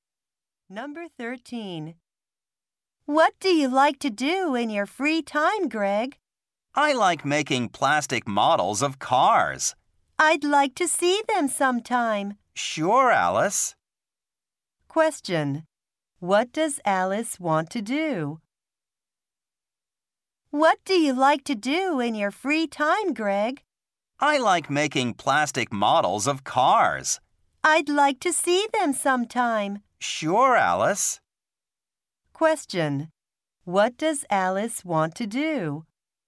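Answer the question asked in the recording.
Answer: See Greg's plastic models.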